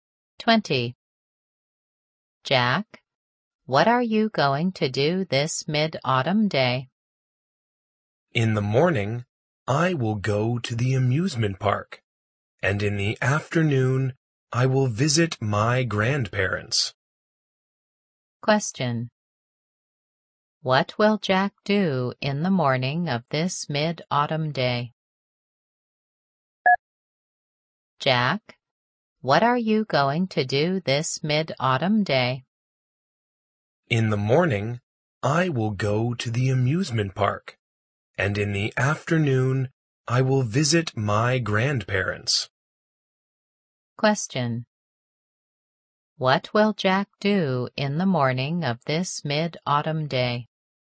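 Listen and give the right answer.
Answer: Go to the amusement park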